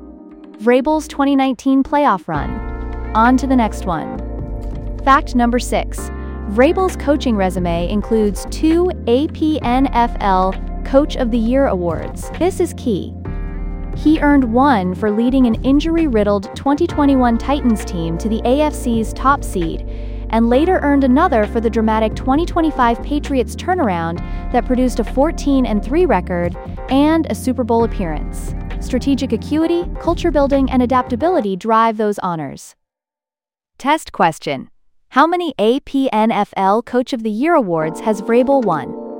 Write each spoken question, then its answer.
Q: How many APNFL Coach of the Year awards has Vrabel won?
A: Correct answer, 2.